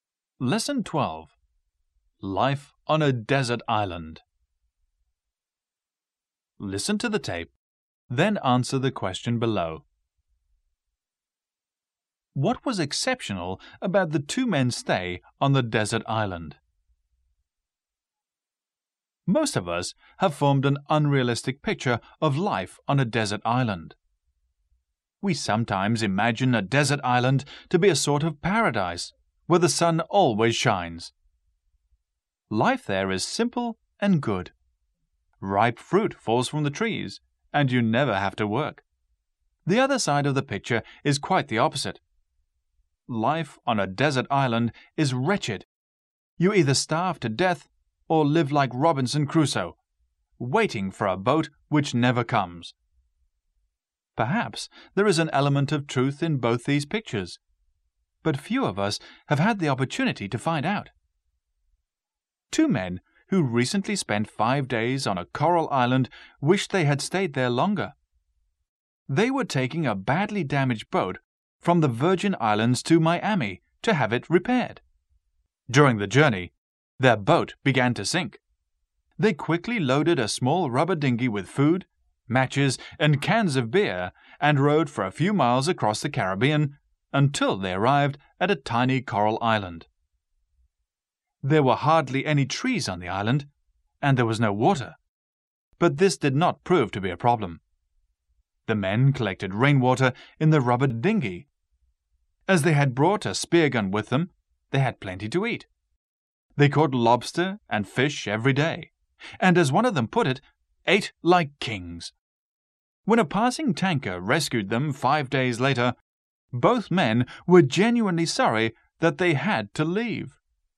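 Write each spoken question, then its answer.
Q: What was exceptional about the two men's stay on the desert island?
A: They enjoyed it and wished they had stayed longer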